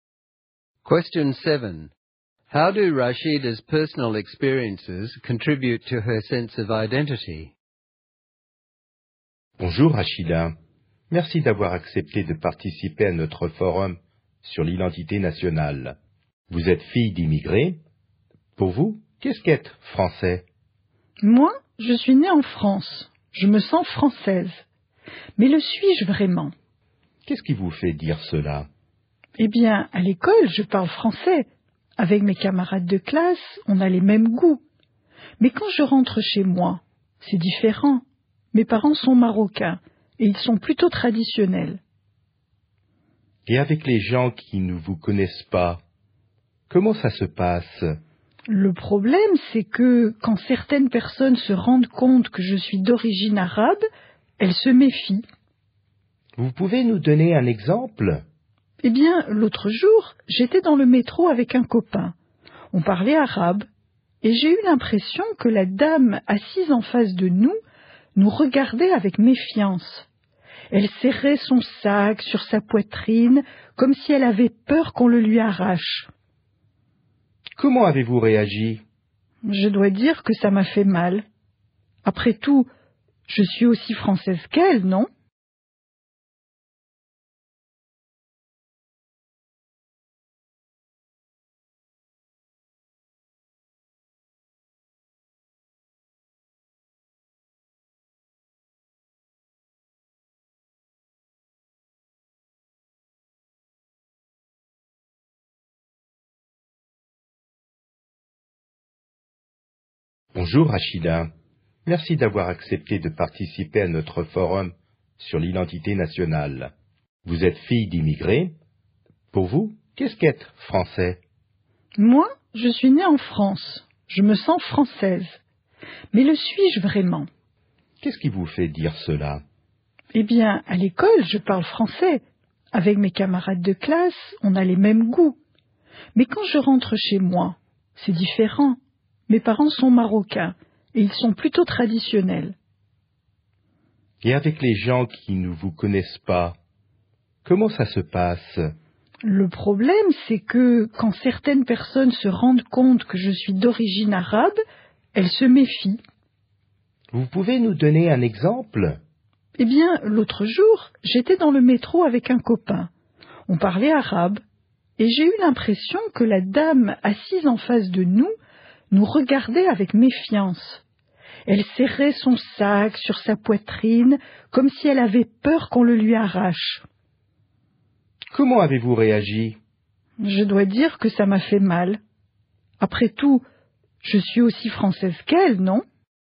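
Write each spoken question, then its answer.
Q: How do Rashida's personal experiences contribute to her sense of identity?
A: She was born in France and feels French at school, but her home life with traditional Moroccan parents is different. Being distrusted by people because of her Arab origin hurts her and makes her doubt whether she is really seen as French.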